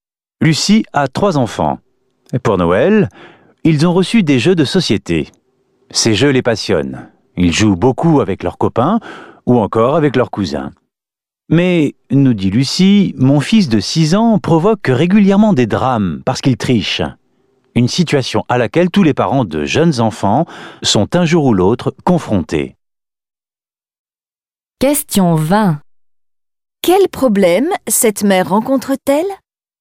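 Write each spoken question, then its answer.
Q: Quel problème cette mère rencontre-t-elle ?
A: Son fils de 6 ans triche aux jeux de société, ce qui provoque des drames.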